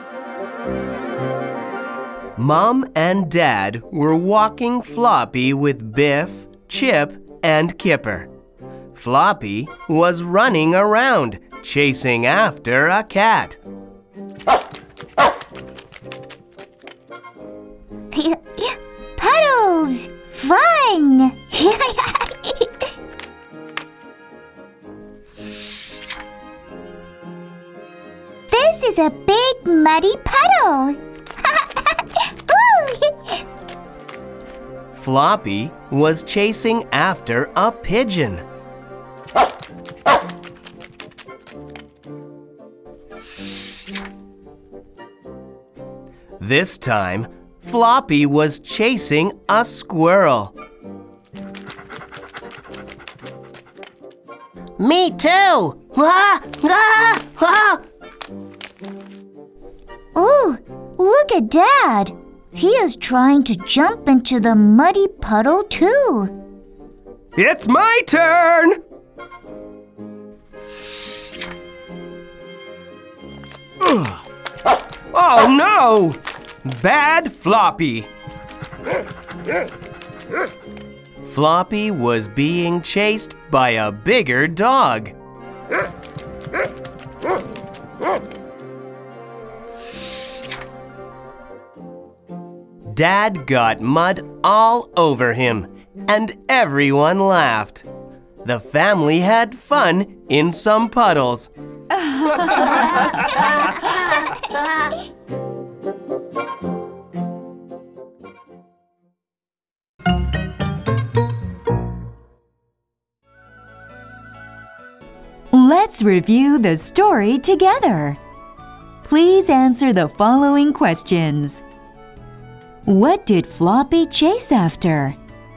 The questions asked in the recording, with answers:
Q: What did Floppy chase after?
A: A cat, a pigeon, a squirrel.